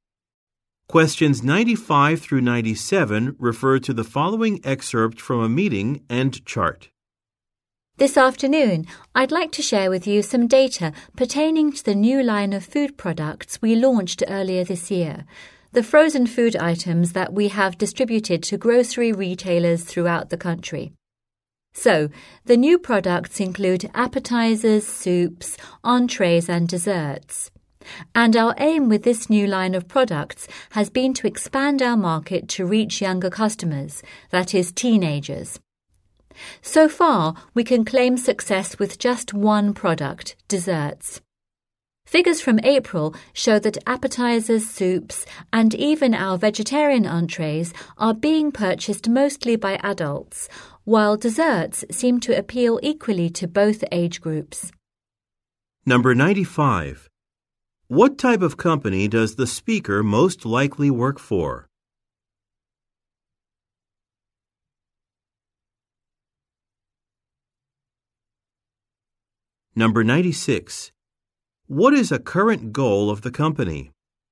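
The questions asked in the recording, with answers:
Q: What type of company does the speaker most likely work for?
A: A frozen food producer

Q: What is a current goal of the company?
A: To reach younger customers (teenagers)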